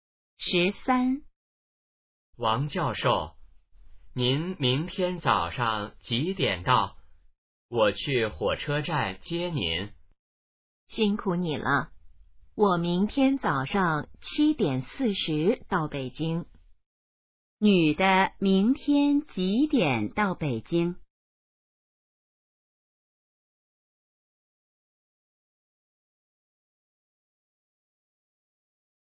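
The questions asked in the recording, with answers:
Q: 女的明天几点到北京?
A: 早上7:40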